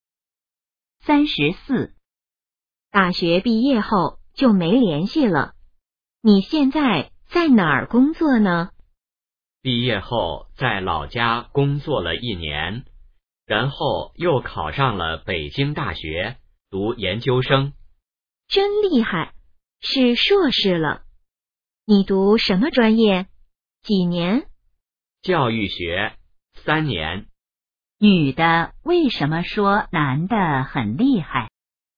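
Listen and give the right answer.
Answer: 因为男的考上了北京大学的研究生(是硕士了)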